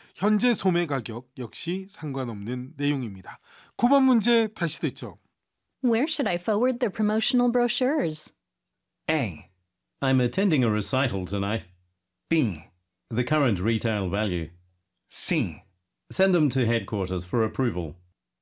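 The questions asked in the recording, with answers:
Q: Where should I forward the promotional brochures?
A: C: Send them to headquarters for approval.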